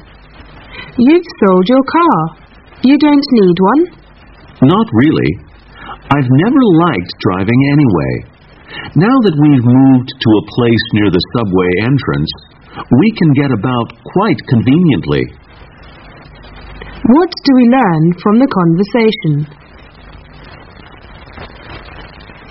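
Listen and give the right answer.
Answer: The man sold his car because he lives near the subway and doesn't need one.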